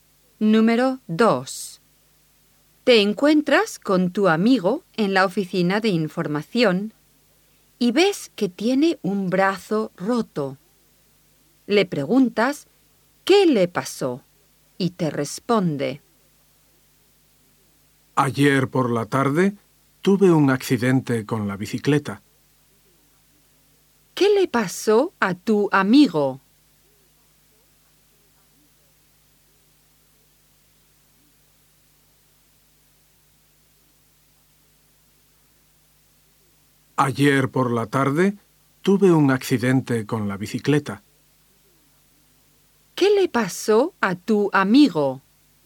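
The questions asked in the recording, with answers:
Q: ¿Qué le pasó a tu amigo?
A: Tuvo un accidente con la bicicleta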